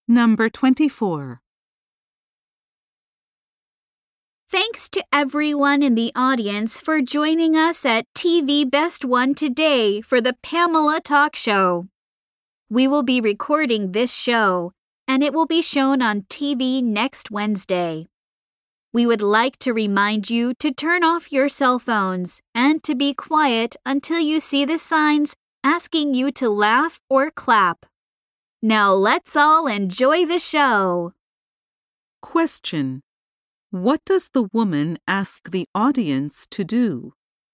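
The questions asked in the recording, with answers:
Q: What does the woman ask the audience to do?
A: Turn off their cell phones and be quiet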